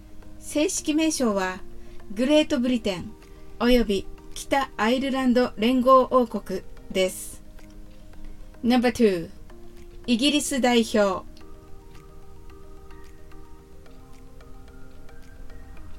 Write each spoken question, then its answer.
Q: イギリス代表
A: The answer is the representatives of the United Kingdom of Great Britain and Northern Ireland.